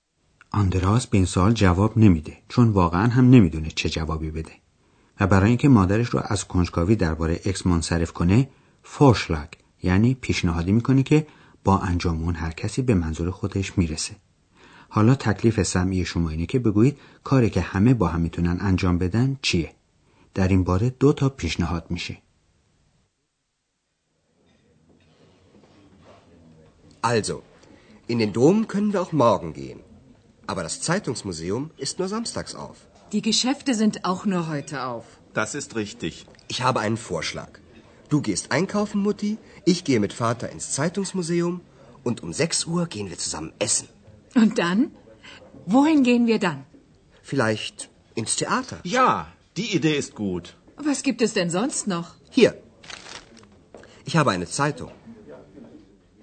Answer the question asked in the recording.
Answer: پس آندراس پیشنهاد کرد که غروب در ساعت شش با هم برن بیرون غذا بخورن و بعد از اون برن تئاتر.